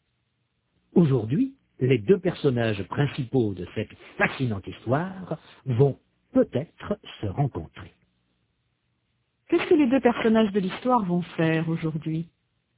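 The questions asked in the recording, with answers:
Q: Qu'est-ce que les deux personnages de l'histoire vont faire aujourd'hui?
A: Ils vont peut-être se rencontrer.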